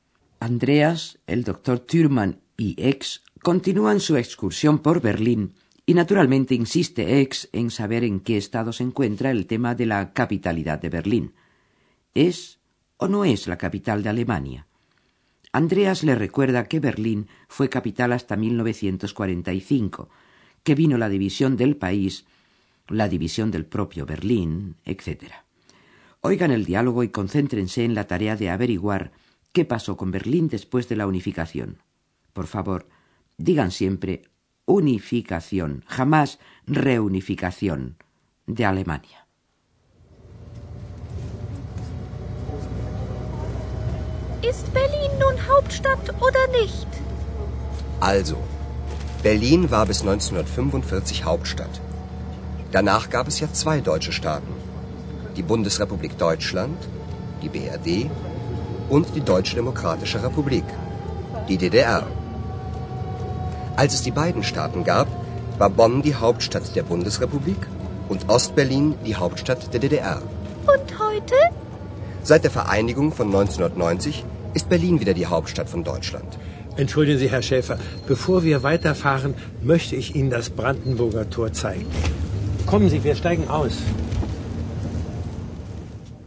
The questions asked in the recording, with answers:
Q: Oigan el diálogo y concéntrense en la tarea de averiguar qué pasó con Berlín después de la unificación.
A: Desde la unificación en 1990 de ambos estados alemanes, Berlín ha vuelto a ser la capital de toda Alemania.